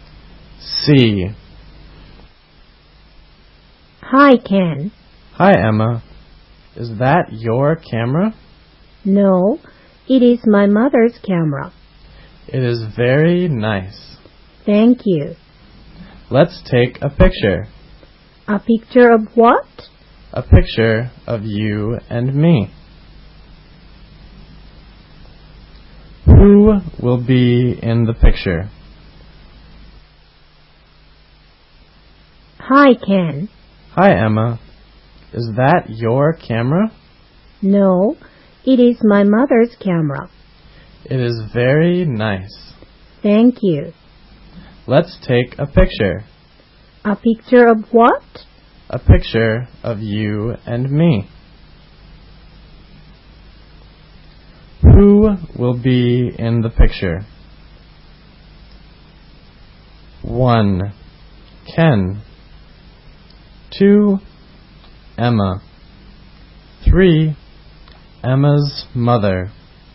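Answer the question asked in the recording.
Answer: 4: Ken and Emma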